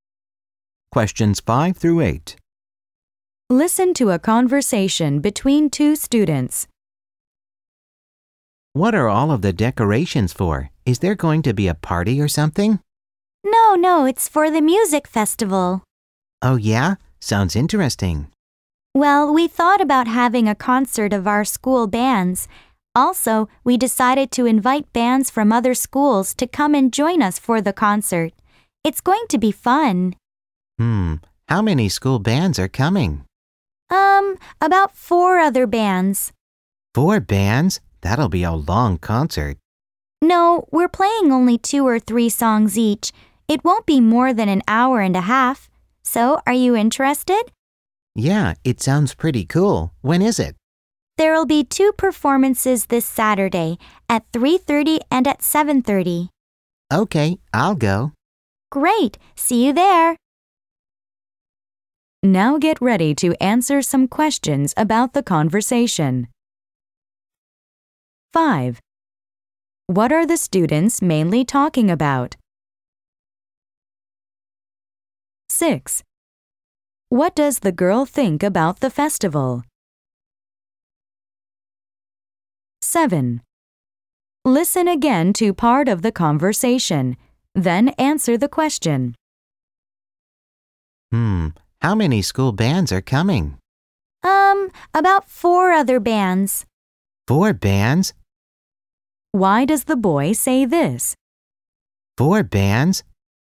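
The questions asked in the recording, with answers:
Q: What are the students mainly talking about?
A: The music festival (school band concert)

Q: What does the girl think about the festival?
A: It sounds pretty cool / interesting

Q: Why does the boy say this?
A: He thinks the concert will be very long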